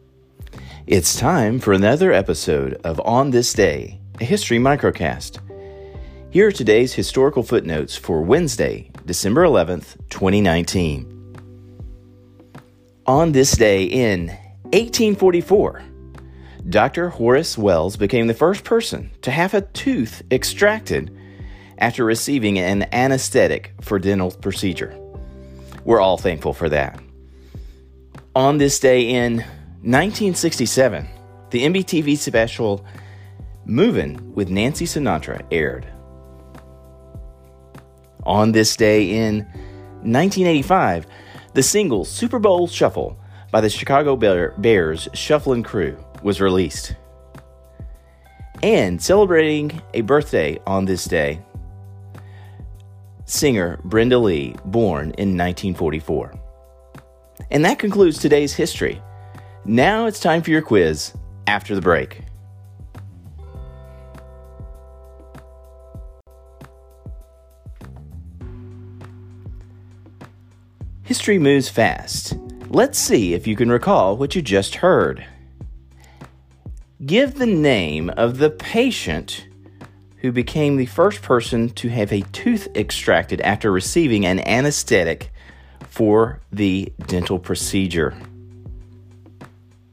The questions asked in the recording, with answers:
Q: Give the name of the patient who became the first person to have a tooth extracted after receiving an anesthetic for the dental procedure.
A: That patient was Dr. Horace Wells back in 1844.